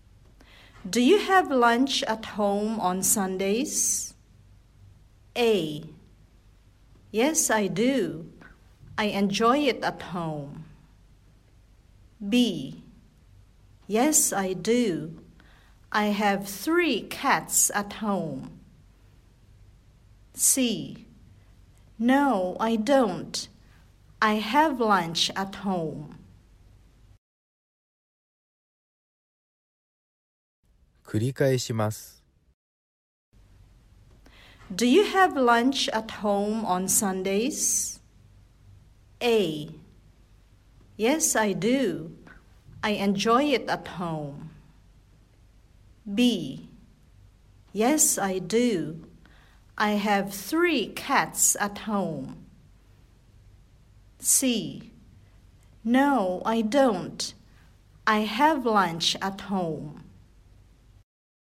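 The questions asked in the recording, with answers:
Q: Do you have lunch at home on Sundays?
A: A: Yes, I do. I enjoy it at home.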